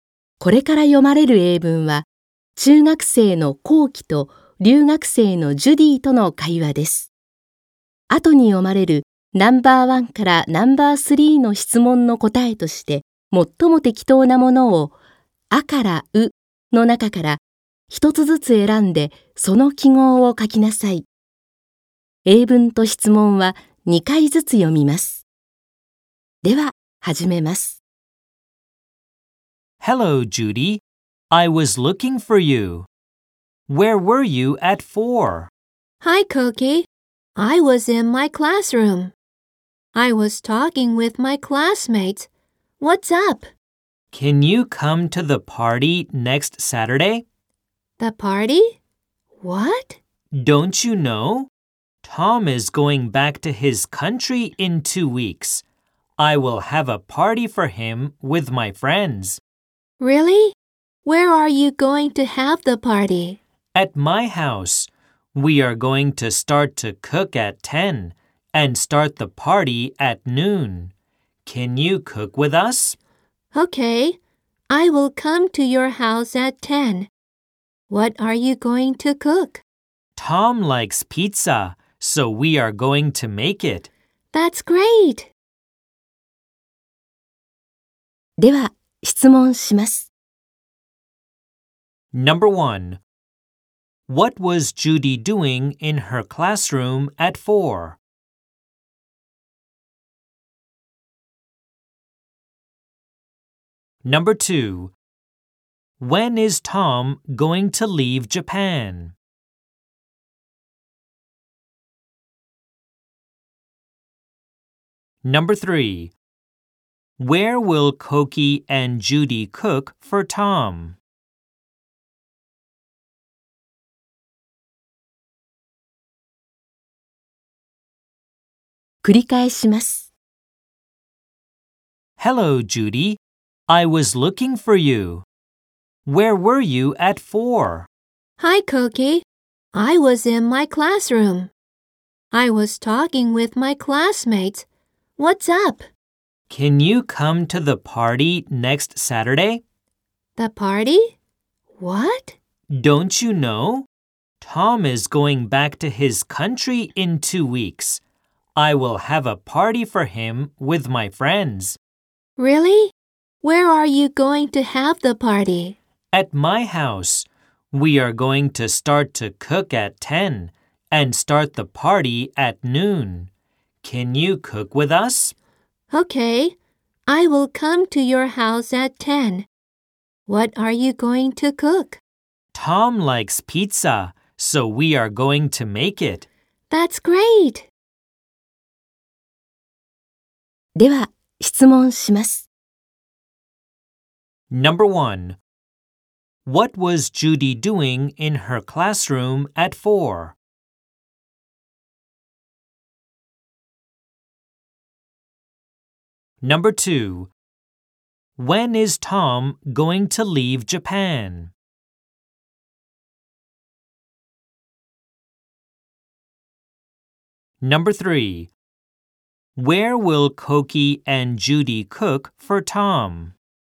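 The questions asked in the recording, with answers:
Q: What was Judy doing in her classroom at 4?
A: She was talking with her classmates.

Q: When is Tom going to leave Japan?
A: In two weeks.

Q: Where will Koki and Judy cook for Tom?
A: At Koki's house.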